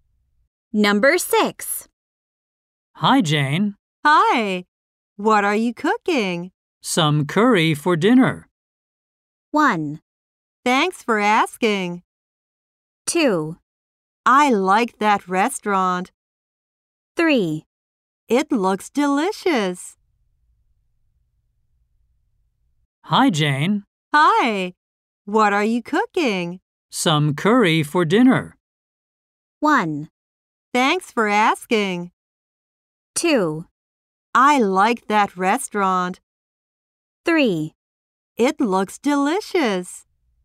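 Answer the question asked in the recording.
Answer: 3: It looks delicious.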